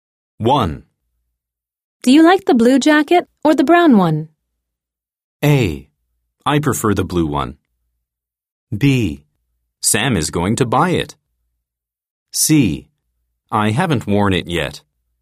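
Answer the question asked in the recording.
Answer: A: I prefer the blue one.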